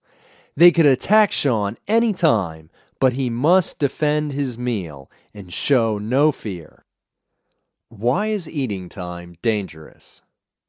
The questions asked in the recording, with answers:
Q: Why is eating time dangerous?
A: Eating time is dangerous because the wolves could attack Sean any time.